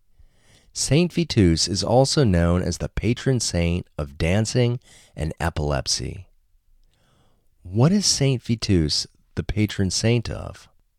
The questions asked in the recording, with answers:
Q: What is Saint Vitus the patron saint of?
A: Saint Vitus is the patron saint of dancing and epilepsy.